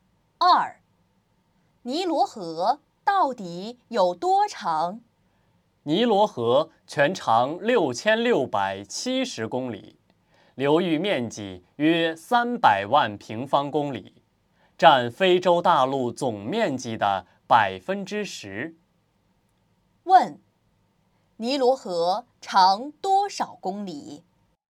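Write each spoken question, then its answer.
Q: 尼罗河长多少公里?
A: 6670公里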